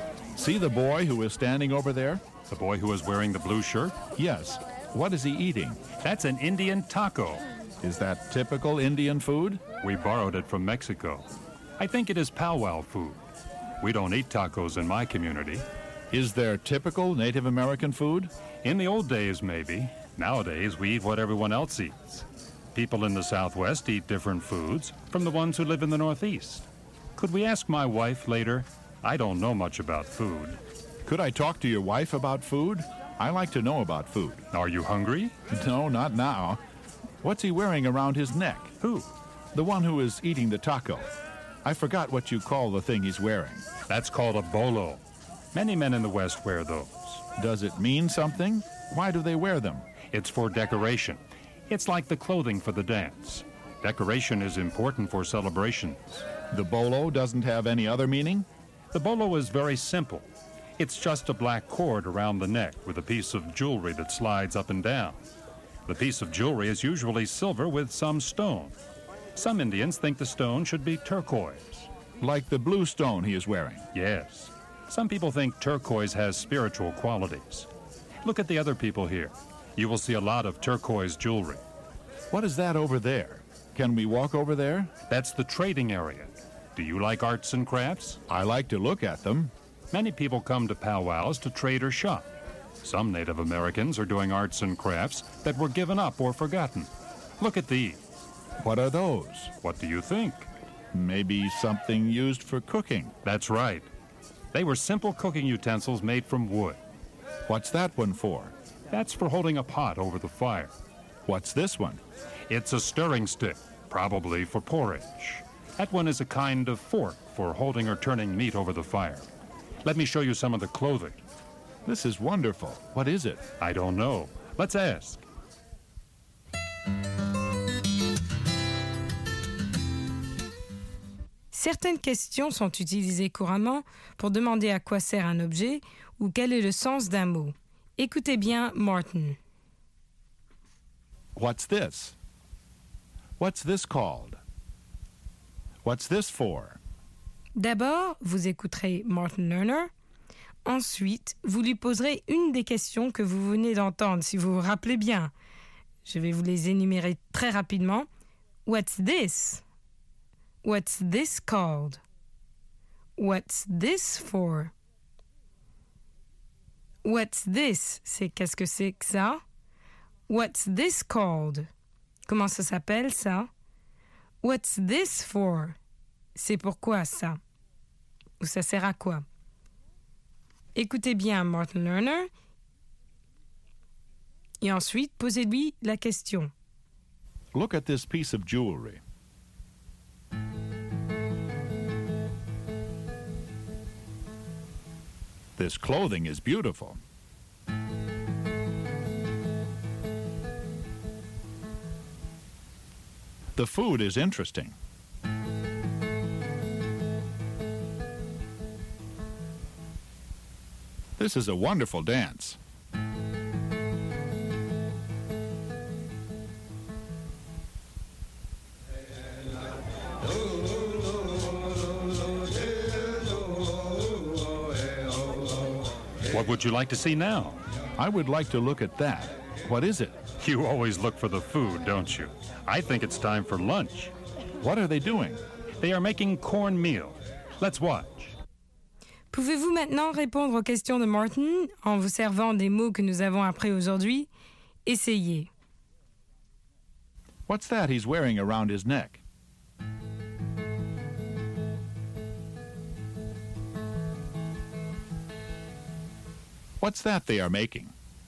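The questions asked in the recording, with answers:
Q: What's that he's wearing around his neck?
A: A bolo

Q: What's that they are making?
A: Cornmeal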